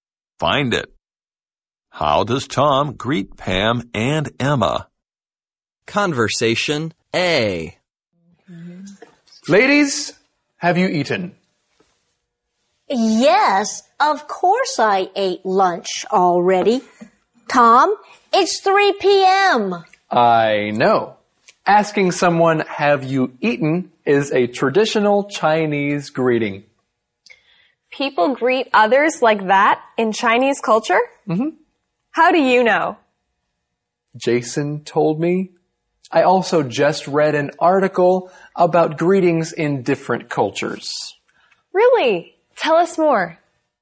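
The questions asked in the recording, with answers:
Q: How does Tom greet Pam and Emma?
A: He asks them "Have you eaten?"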